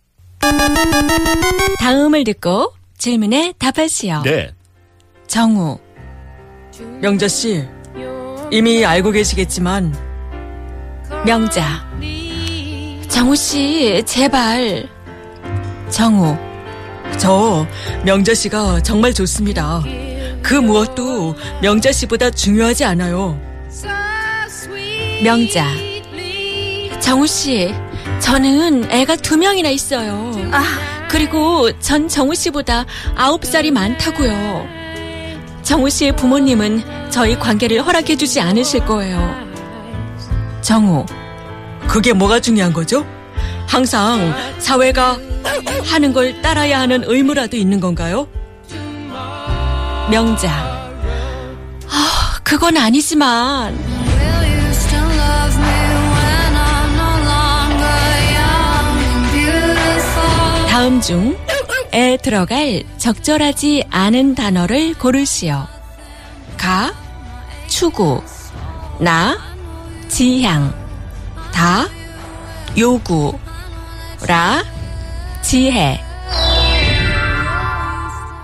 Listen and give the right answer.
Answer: Wisdom, jihe. Doesn't make any sense.